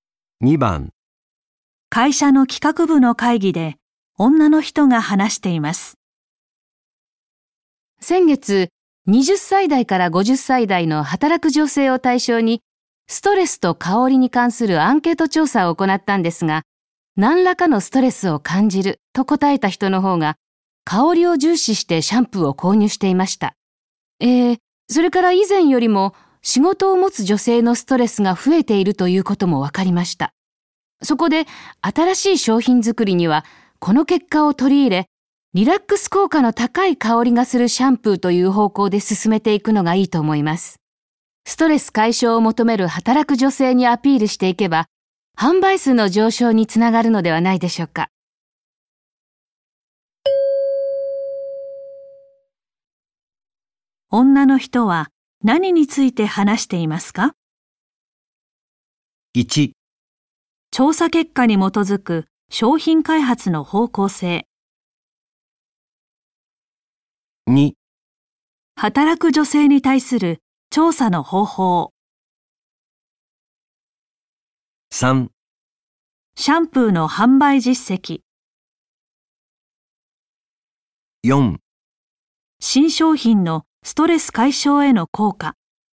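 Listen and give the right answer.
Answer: 1: 調査結果に基づく商品開発の方向性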